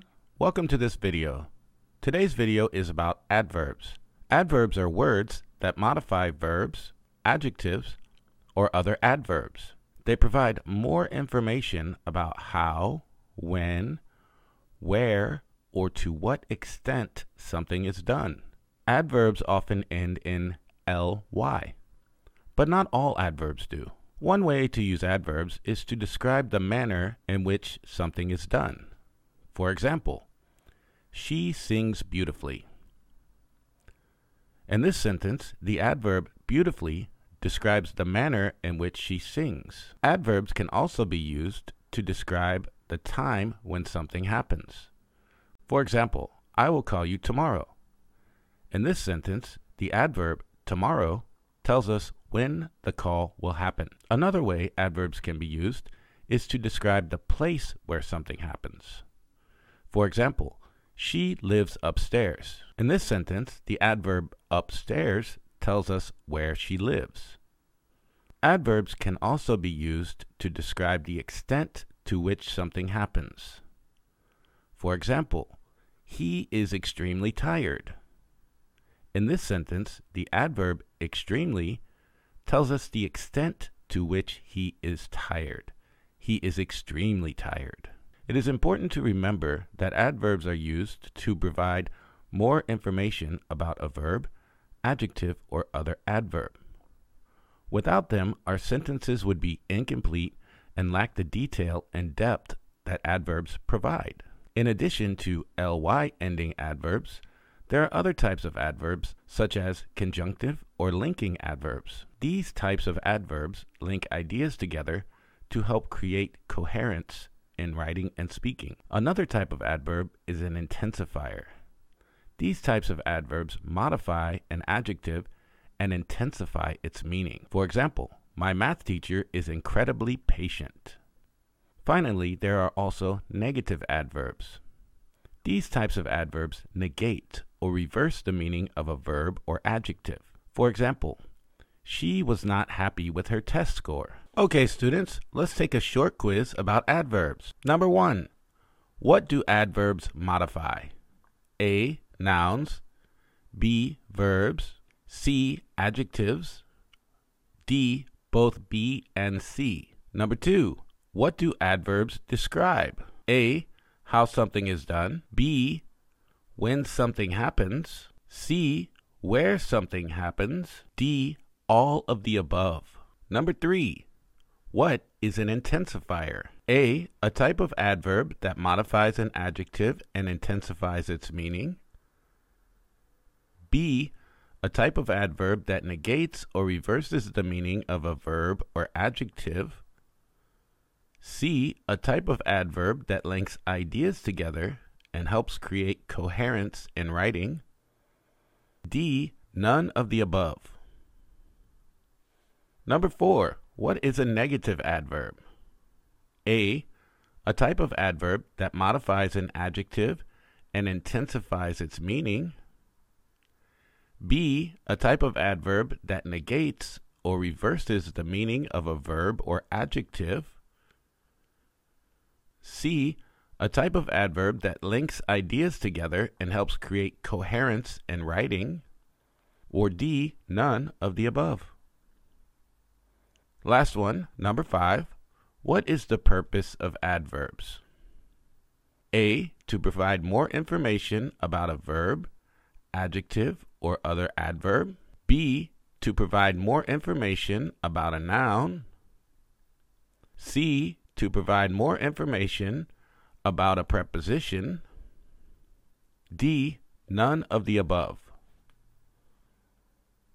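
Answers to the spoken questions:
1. D: both B and C
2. D: all of the above
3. A: a type of adverb that modifies an adjective and intensifies its meaning
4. B: a type of adverb that negates or reverses the meaning of a verb or adjective
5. A: to provide more information about a verb, adjective, or other adverb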